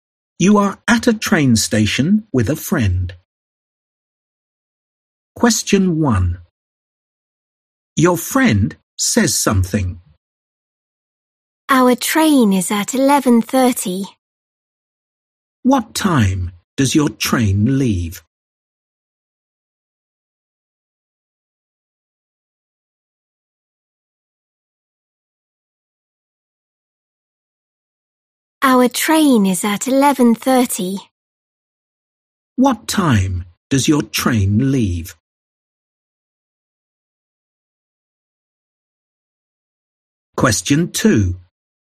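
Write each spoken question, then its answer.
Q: What time does your train leave?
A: 11:30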